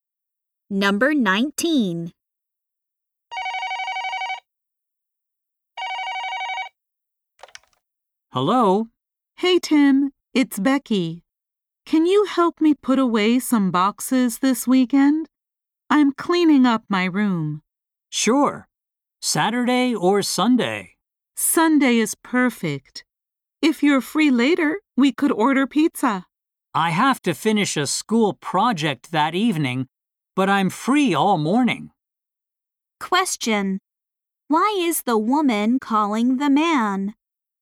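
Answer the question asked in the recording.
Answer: To ask him to help put away boxes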